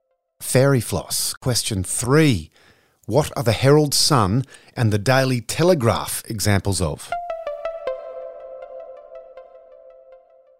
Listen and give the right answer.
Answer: Newspapers.